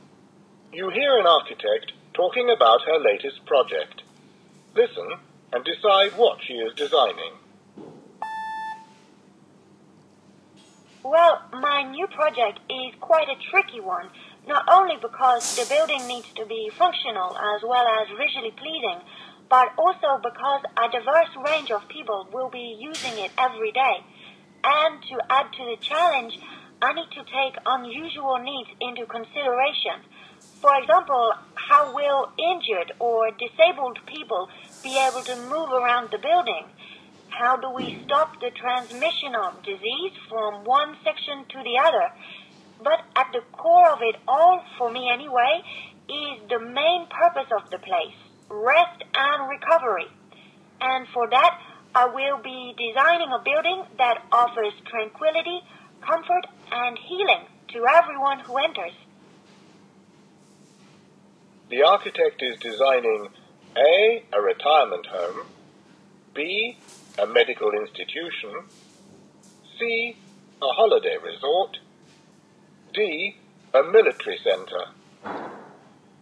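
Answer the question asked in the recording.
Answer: B: a medical institution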